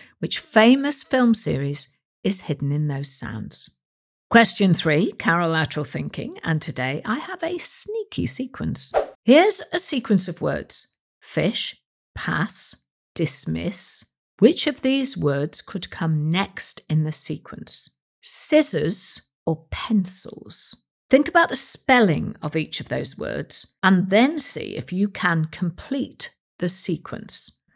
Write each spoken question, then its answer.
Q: Fish, pass, dismiss. Which of these words could come next in the sequence?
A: And the answer is scissors.